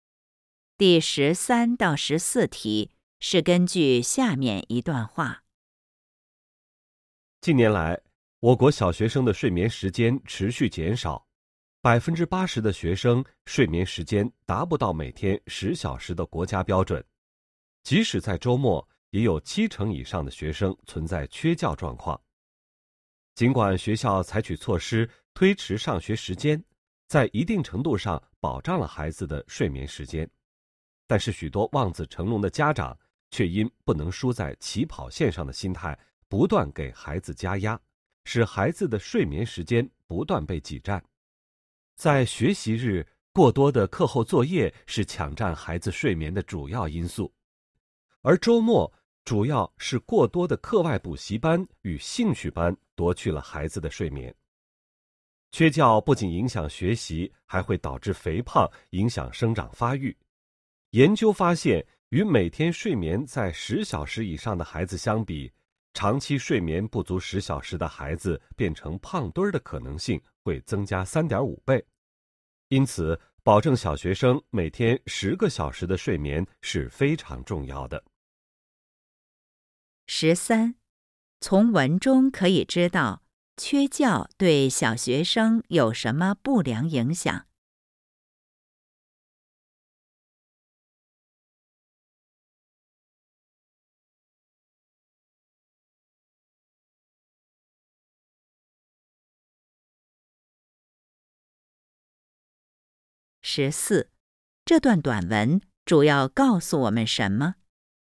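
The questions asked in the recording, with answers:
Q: 从文中可以知道缺觉对小学生有什么不良影响。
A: 影响学习,导致肥胖,影响生长发育

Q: 这段短文主要告诉我们什么?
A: 保证小学生每天10小时睡眠非常重要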